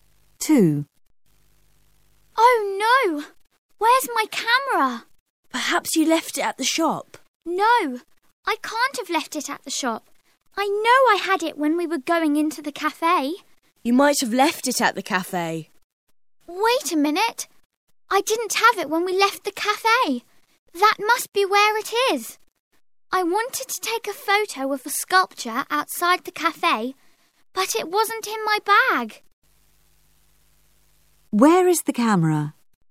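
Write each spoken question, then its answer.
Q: Where is the camera?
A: At the cafe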